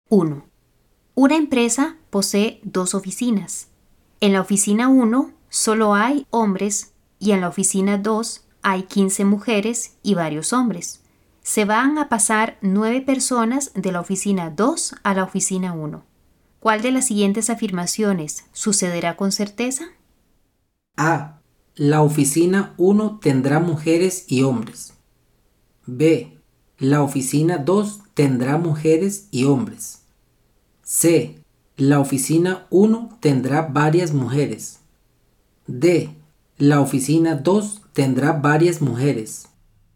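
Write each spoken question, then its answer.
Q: ¿Cuál de las siguientes afirmaciones sucederá con certeza?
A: D: La oficina 2 tendrá varias mujeres.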